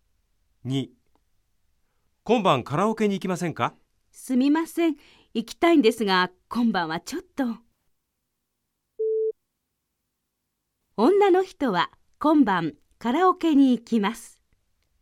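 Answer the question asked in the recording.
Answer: ×(正しくない)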